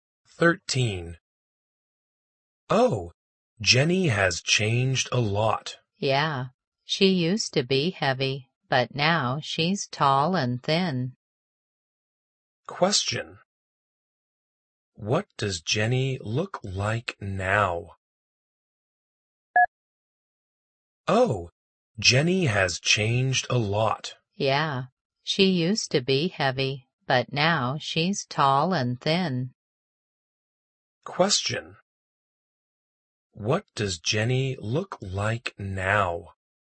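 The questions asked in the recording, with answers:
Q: What does Jenny look like now?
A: Tall and thin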